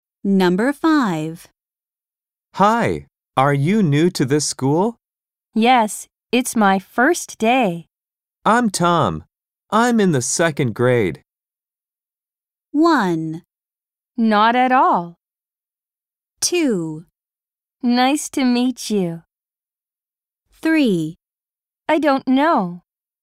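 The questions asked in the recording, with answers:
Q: I'm Tom. I'm in the second grade.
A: 2: Nice to meet you.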